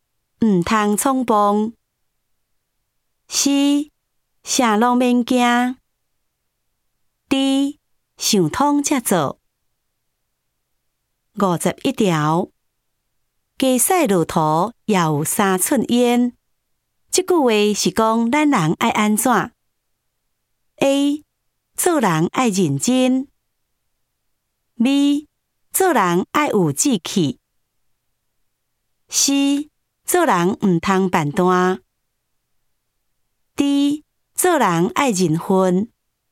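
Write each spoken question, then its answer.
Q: 即句话是讲咱人爱安怎 ?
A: B: 做人爱有志气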